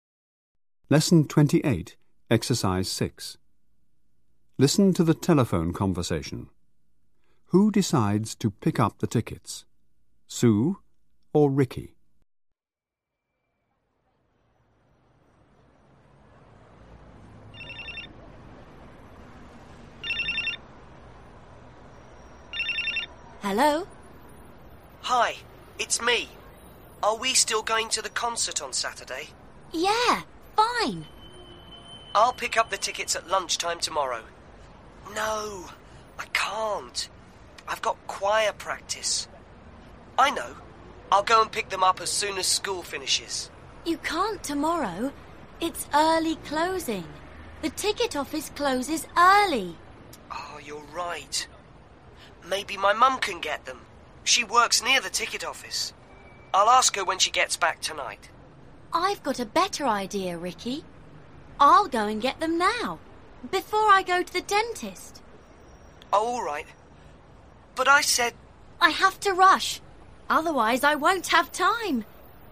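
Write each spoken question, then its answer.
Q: Who decides to pick up the tickets? Sue or Ricky.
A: Sue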